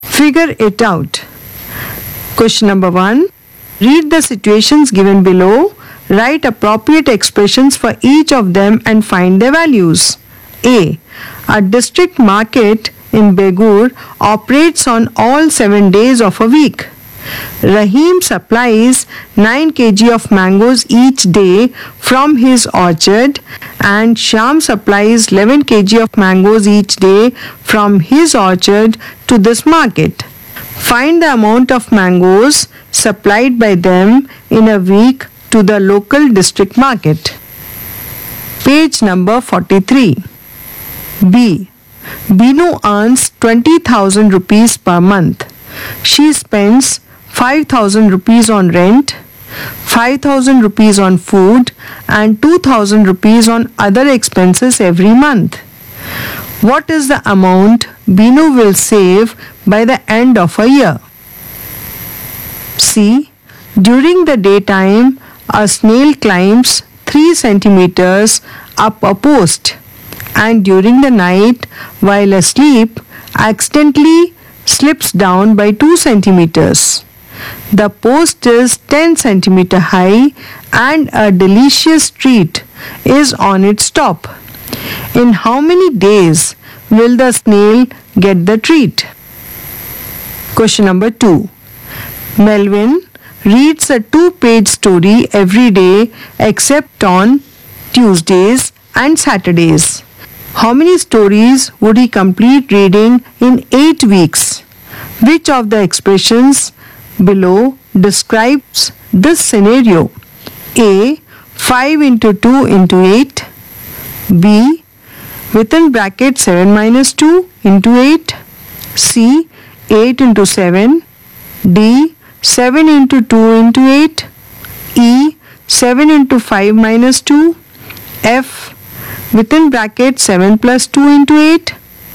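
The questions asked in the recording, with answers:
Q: Find the amount of mangoes supplied by them in a week to the local district market.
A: 140 kg

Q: What is the amount Binu will save by the end of a year?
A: 96,000 rupees

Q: In how many days will the snail get the treat?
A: 8 days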